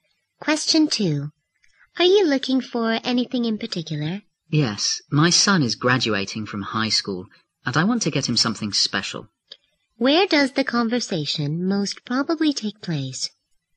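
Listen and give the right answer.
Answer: In a store.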